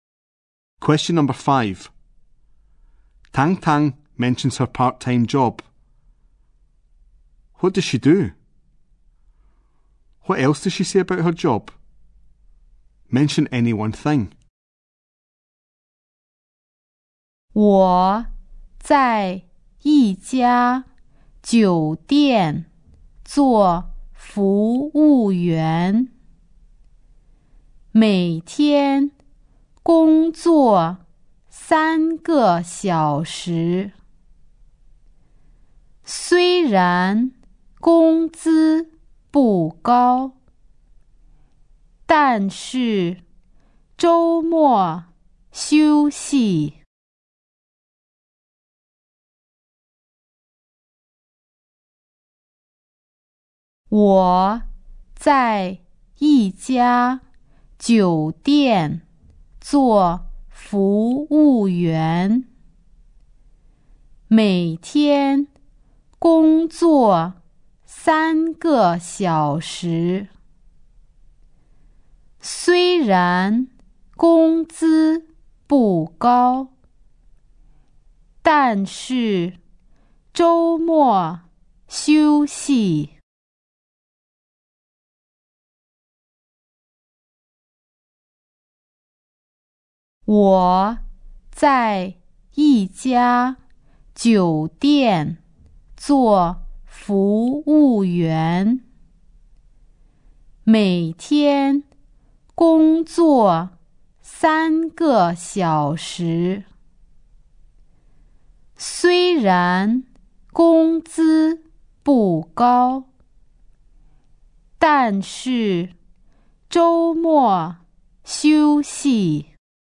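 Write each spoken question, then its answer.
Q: What does she do?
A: She works as a waitress in a hotel

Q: What else does she say about her job?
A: She works three hours a day; the pay isn't high but she has weekends off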